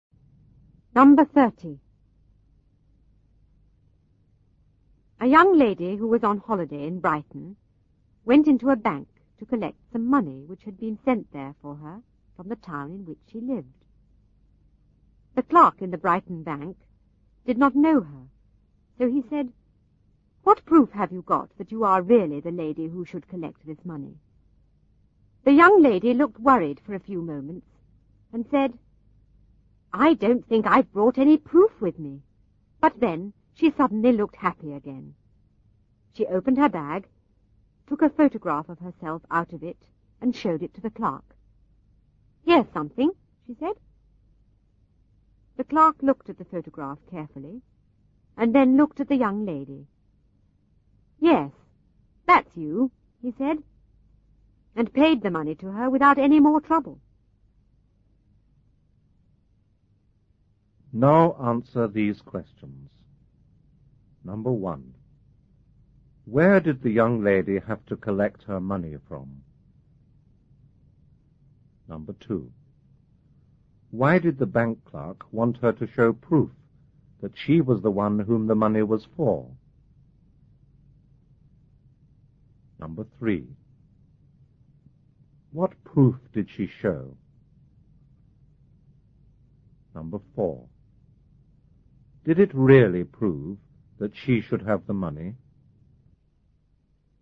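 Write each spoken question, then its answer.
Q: Where did the young lady have to collect her money from?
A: A bank in Brighton

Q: Why did the bank clerk want her to show proof that she was the one whom the money was for?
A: Because he did not know her

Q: What proof did she show?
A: A photograph of herself

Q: Did it really prove that she should have the money?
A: No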